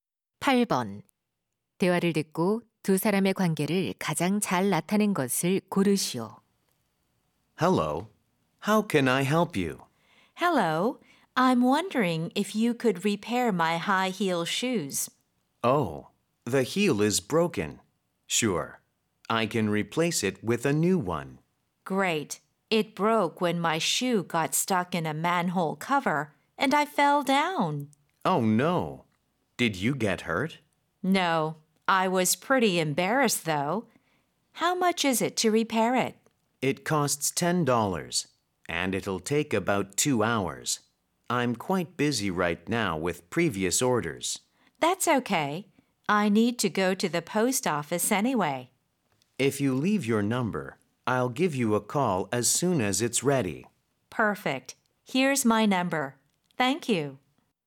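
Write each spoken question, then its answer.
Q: 대화를 듣고 두 사람의 관계를 가장 잘 나타낸 것을 고르시오.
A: 손님 - 구두 수선공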